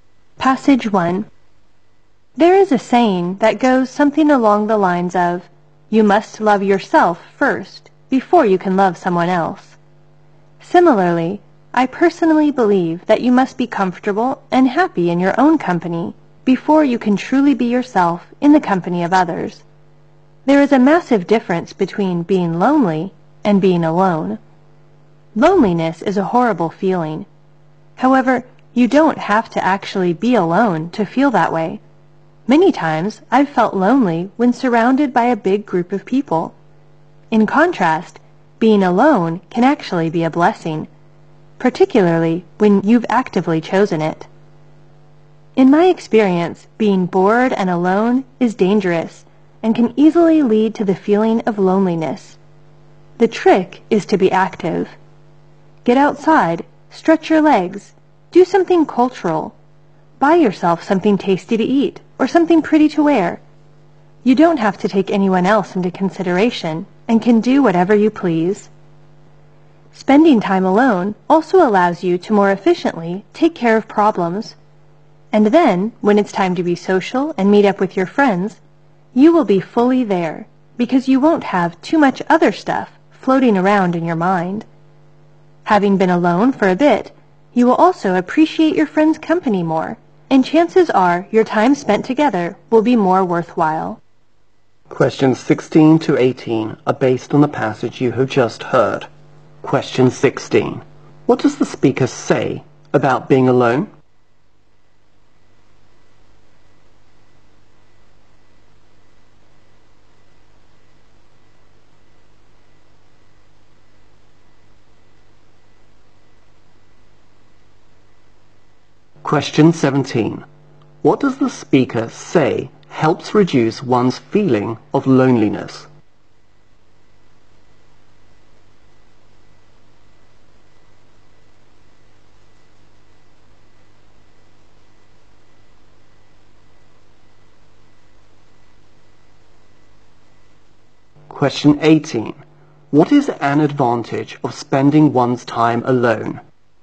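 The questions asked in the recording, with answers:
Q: What does the speaker say about being alone?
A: It can be a blessing, especially when chosen

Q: What does the speaker say helps reduce one's feeling of loneliness?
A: Being active

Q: What is an advantage of spending one's time alone?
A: You can take care of problems more efficiently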